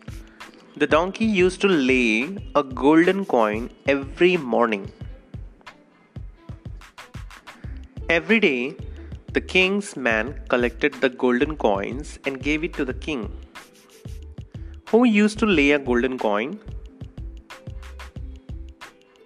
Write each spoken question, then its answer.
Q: Who used to lay a golden coin?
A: The donkey. The donkey of the king used to lay a golden coin.